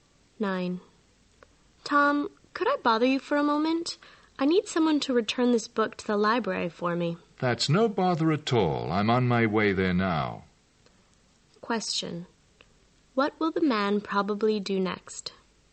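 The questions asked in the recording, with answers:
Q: What will the man probably do next?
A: Go to the library and return the book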